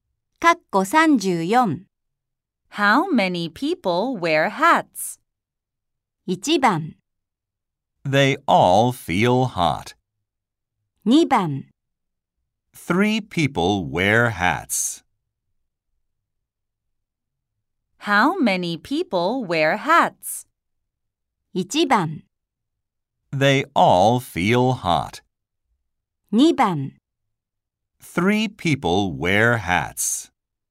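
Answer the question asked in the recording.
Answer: 2: Three people wear hats.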